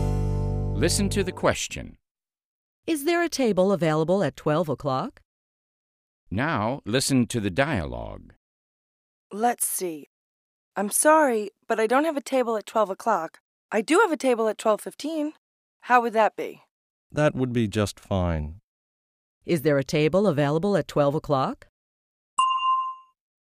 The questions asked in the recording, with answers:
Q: Is there a table available at 12 o'clock?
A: No, there isn't a table available at 12 o'clock, but there is one available at 12:15.